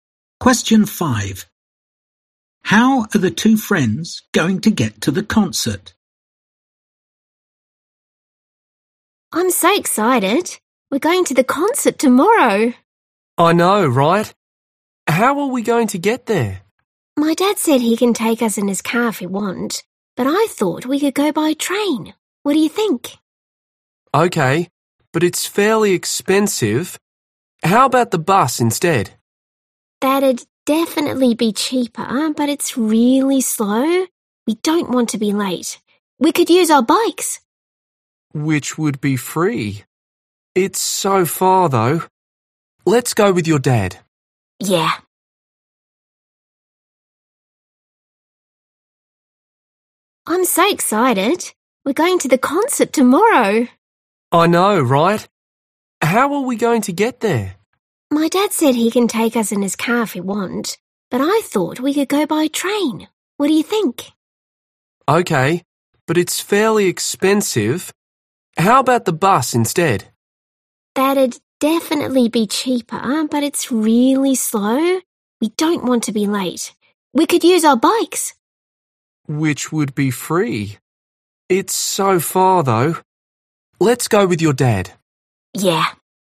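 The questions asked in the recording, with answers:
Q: How are the two friends going to get to the concert?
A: by car (with dad)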